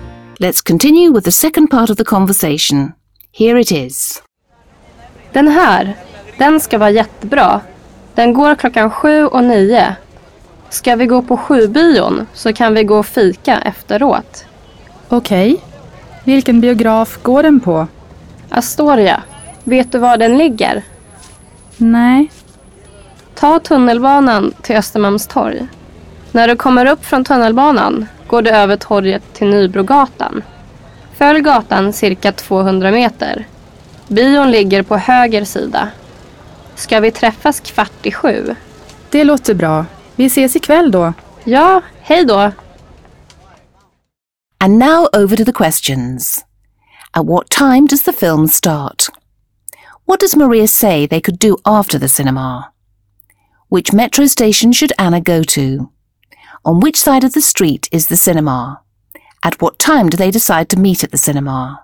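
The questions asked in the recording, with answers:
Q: At what time does the film start?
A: 7 o'clock

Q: What does Maria say they could do after the cinema?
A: Have coffee (fika)

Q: Which metro station should Anna go to?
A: Östermalmstorg

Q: On which side of the street is the cinema?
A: The right side

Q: At what time do they decide to meet at the cinema?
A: 7:15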